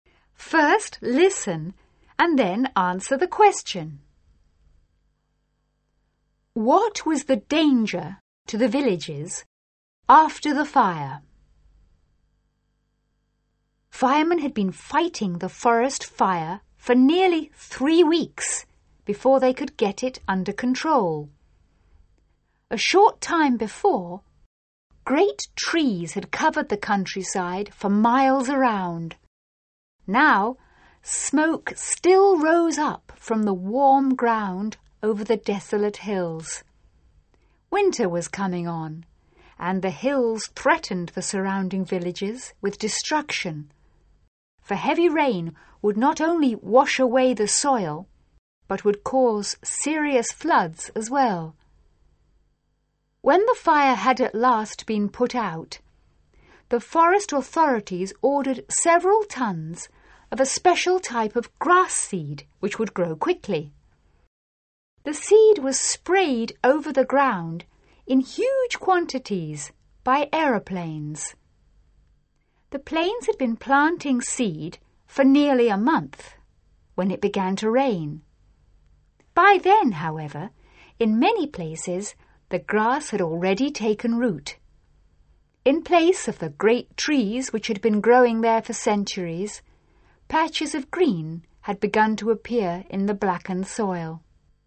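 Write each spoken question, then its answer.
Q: What was the danger to the villages after the fire?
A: Heavy rain could wash away the soil and cause serious floods.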